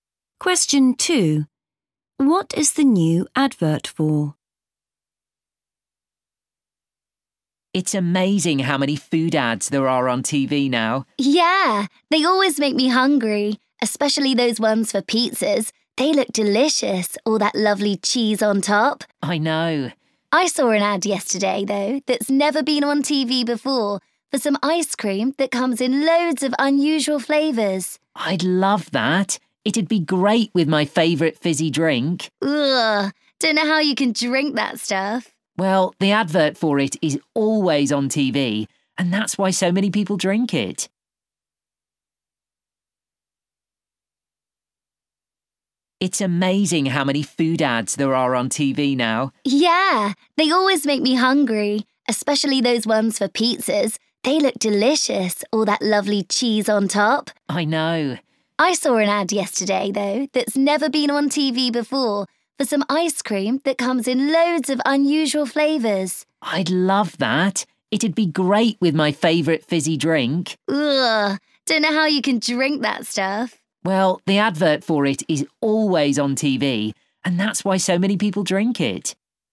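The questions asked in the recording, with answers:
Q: What is the new advert for?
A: ice cream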